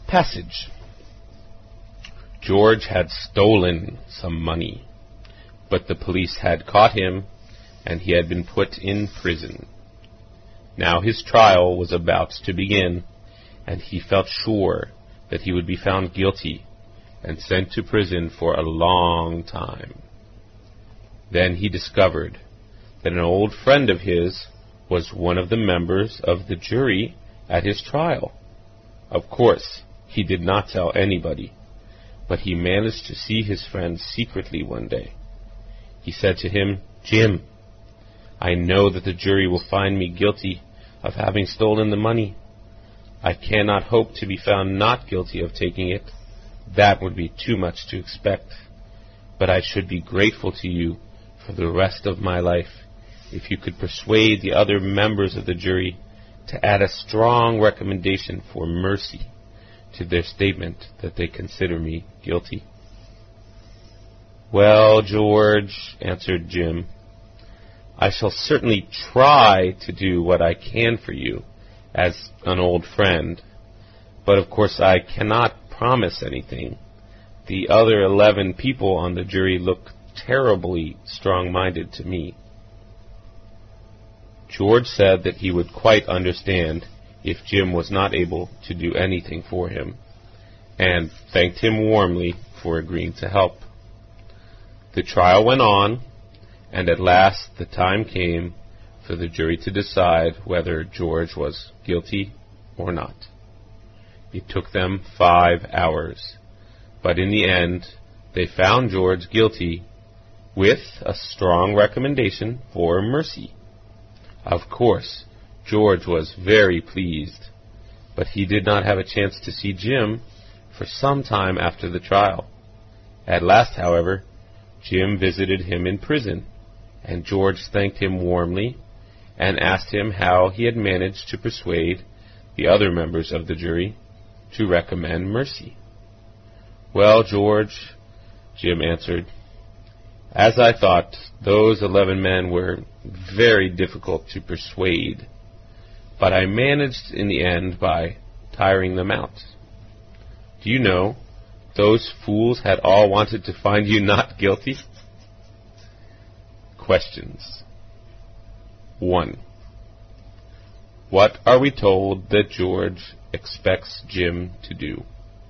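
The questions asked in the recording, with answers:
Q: What are we told that George expects Jim to do?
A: Persuade the other jurors to recommend mercy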